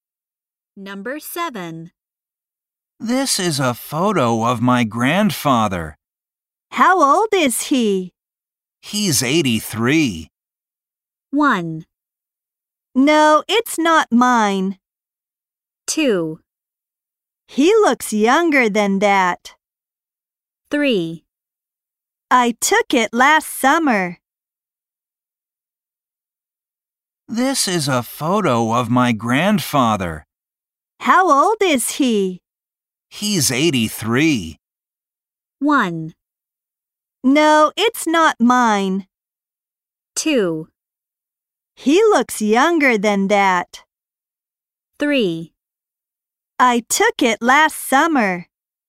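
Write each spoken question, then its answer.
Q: He's 83.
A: 2: He looks younger than that.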